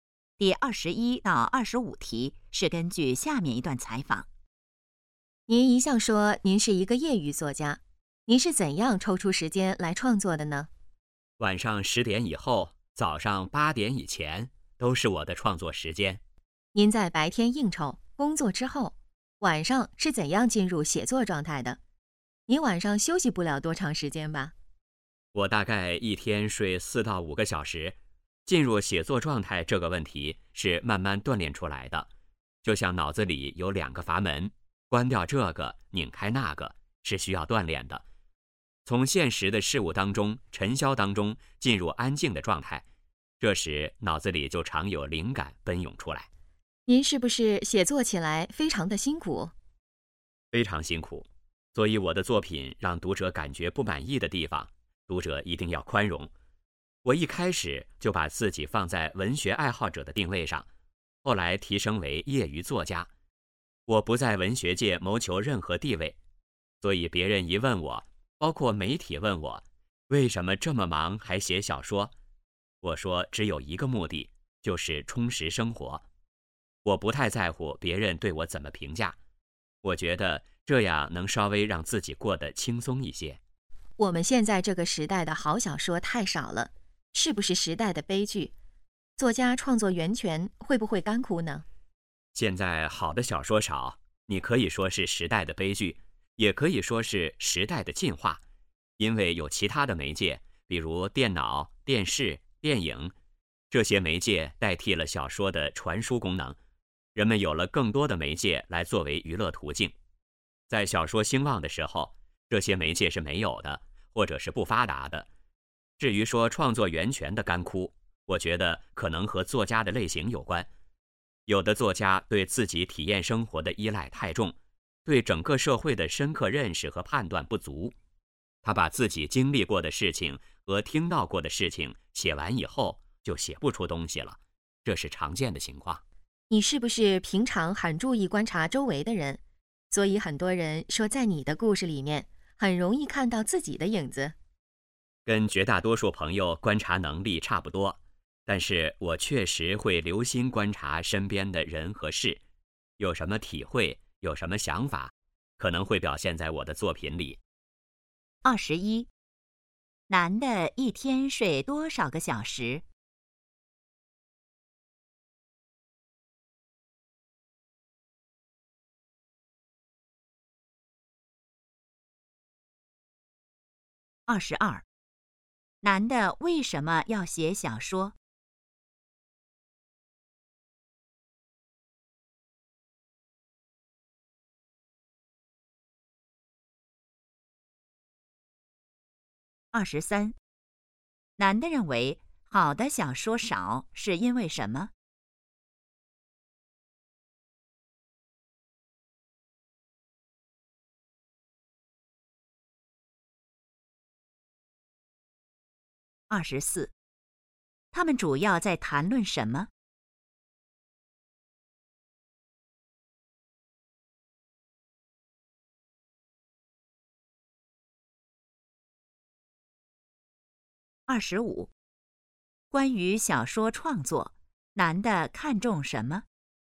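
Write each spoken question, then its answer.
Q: 男的一天睡多少个小时?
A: 四到五个小时

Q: 男的为什么要写小说?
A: 为了充实生活

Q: 男的认为好的小说少是因为什么?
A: 其他媒介代替了小说的传输功能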